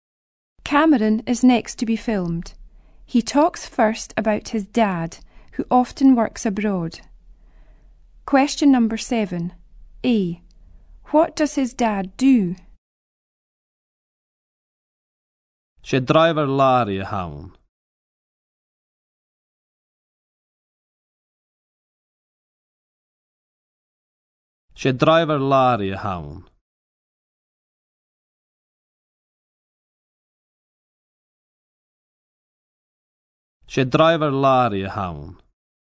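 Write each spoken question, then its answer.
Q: What does his dad do?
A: He is a lorry driver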